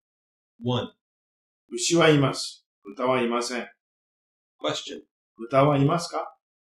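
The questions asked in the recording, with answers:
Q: 豚はいますか?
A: いいえ、いません。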